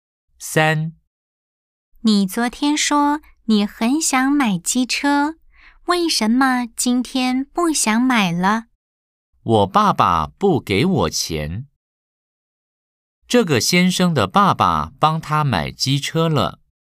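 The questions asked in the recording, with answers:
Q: 这个先生的爸爸帮他买机车了。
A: False (X)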